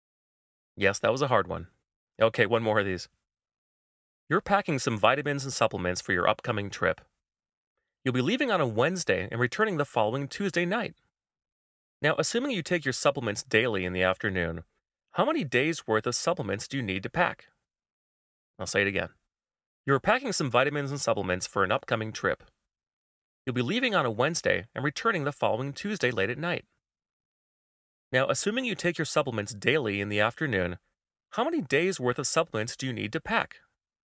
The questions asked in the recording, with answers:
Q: Now, assuming you take your supplements daily in the afternoon, how many days' worth of supplements do you need to pack?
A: Well, the correct answer is 7 days, as you need supplements for 7 full days' worth.